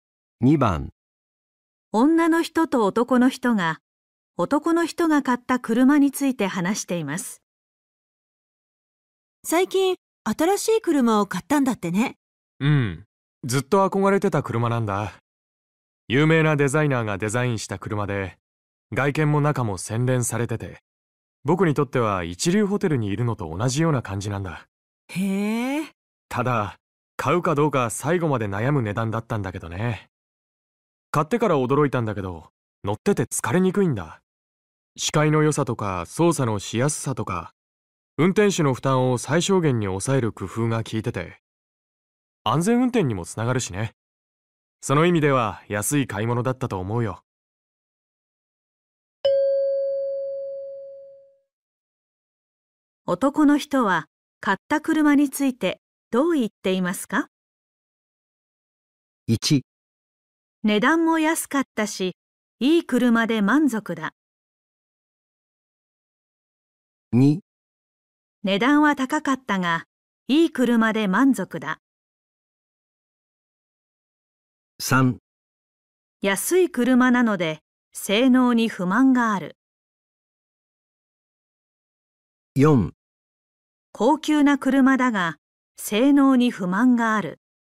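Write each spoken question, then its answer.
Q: 男の人は買った車についてどう言っていますか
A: 2: 値段は高かったが、いい車で満足だ。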